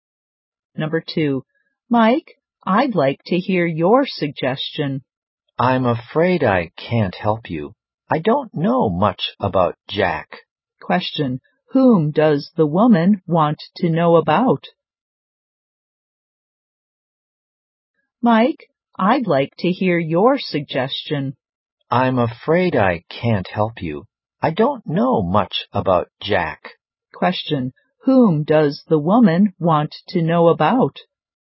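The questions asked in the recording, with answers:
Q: Question, whom does the woman want to know about?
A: Jack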